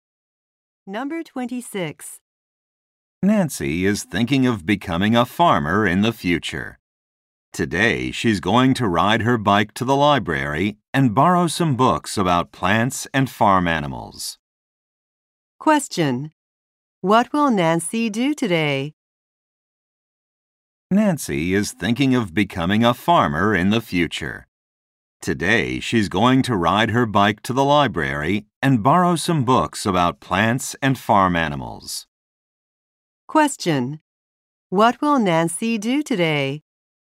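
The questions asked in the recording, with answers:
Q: What will Nancy do today?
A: Borrow books from the library.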